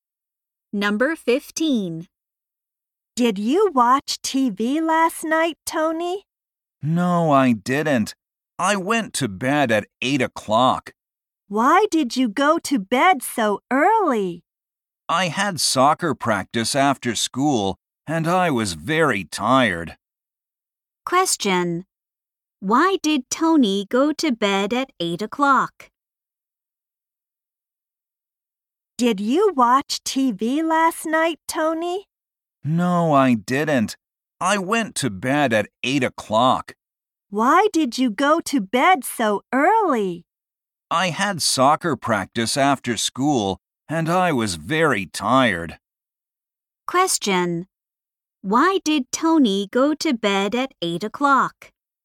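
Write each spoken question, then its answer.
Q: Why did Tony go to bed at 8 o'clock?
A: He was very tired after soccer practice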